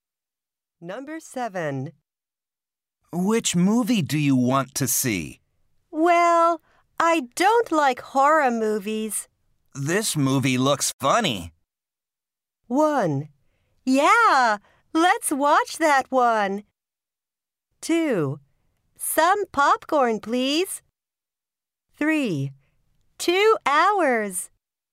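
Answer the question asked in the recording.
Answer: 1: Yeah, let's watch that one.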